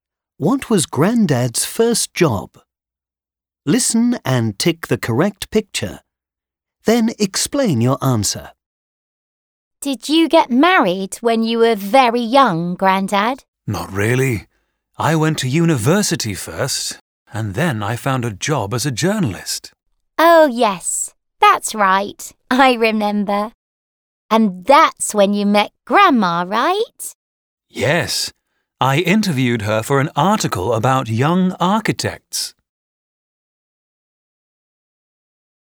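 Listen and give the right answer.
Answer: a journalist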